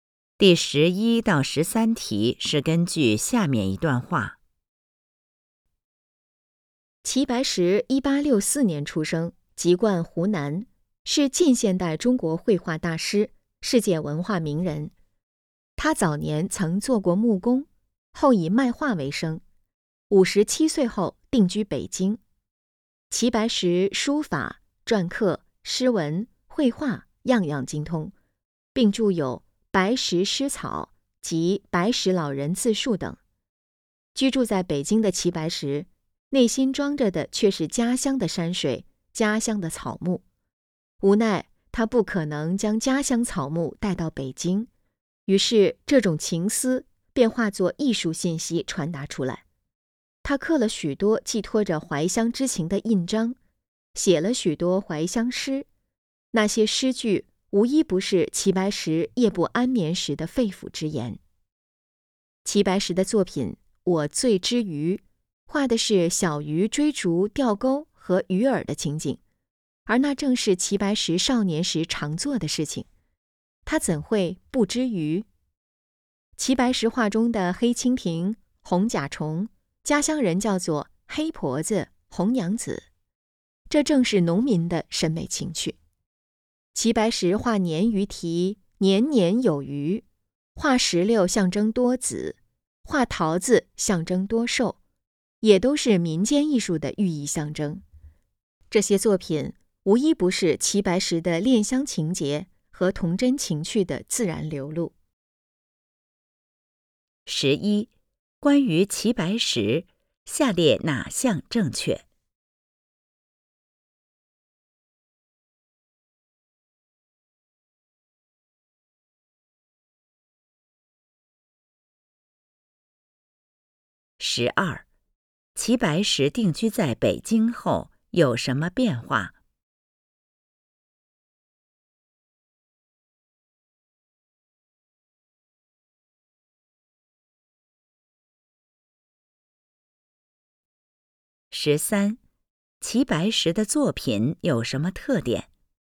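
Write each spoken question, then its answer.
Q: 十二,齐白石定居在北京后有什么变化?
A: 非常思念家乡,把怀乡之情化作艺术

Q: 十三,齐白石的作品有什么特点?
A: 流露出恋乡情结和童真情趣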